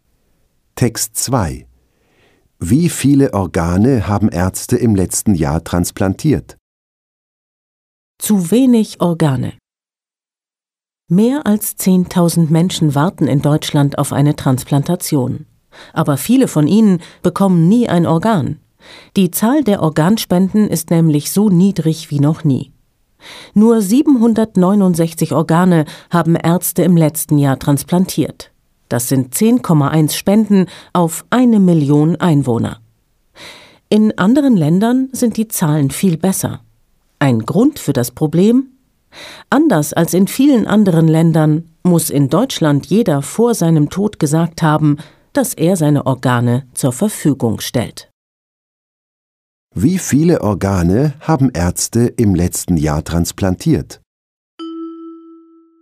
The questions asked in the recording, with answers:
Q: Wie viele Organe haben Ärzte im letzten Jahr transplantiert?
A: Sie haben 769 Organe transplantiert.